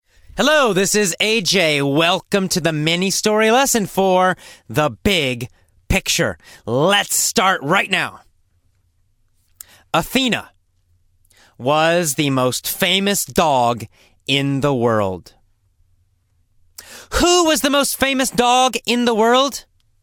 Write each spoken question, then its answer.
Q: Who was the most famous dog in the world?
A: Athena. Athena was the most famous dog in the world.